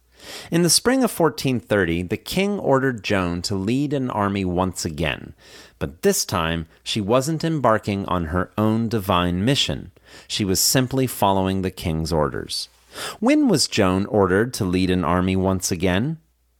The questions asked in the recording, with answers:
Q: When was Joan ordered to lead an army once again?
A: In the spring of 1430, the king ordered Joan to lead an army once again.